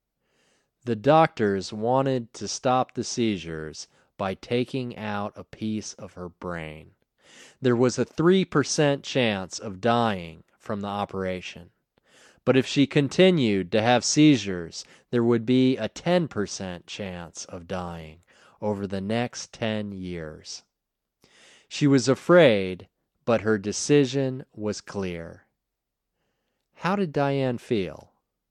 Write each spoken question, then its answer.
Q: How did Diane feel?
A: Diane was afraid.